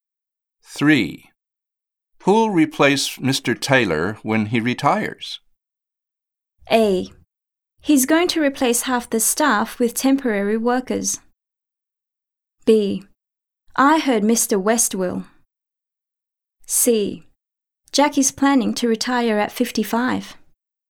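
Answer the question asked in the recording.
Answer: B: I heard Mr. West will.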